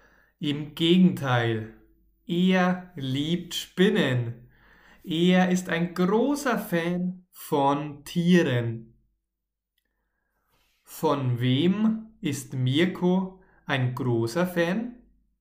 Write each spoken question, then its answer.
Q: Von wem ist Mirko ein großer Fan?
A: Von Tieren. Mirko ist ein großer Fan von Tieren.